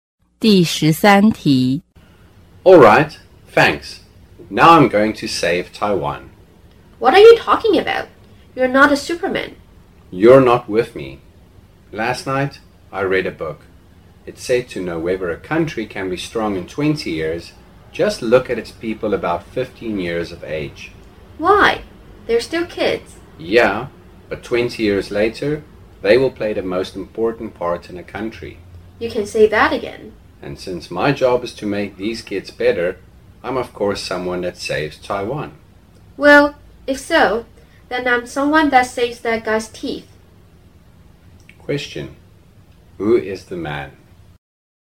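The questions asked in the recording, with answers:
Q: Who is the man?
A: A teacher of teenagers (about 15 years old)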